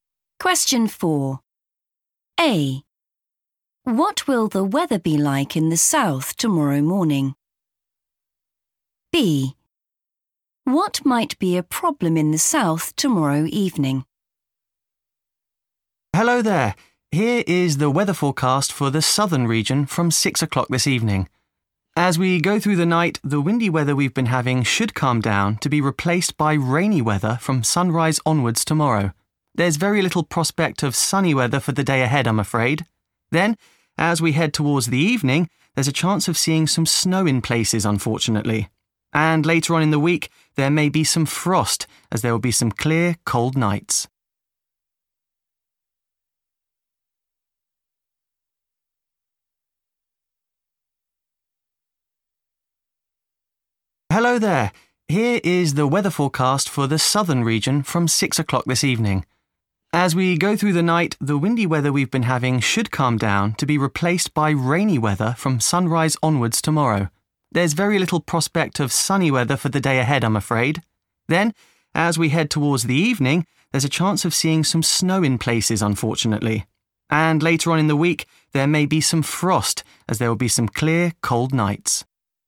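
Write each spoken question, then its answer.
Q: What will the weather be like in the south tomorrow morning?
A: rainy

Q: What might be a problem in the south tomorrow evening?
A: snow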